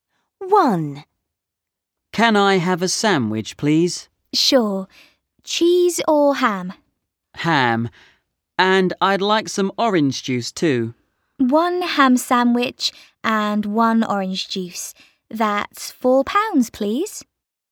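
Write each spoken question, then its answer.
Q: Where are they?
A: At a café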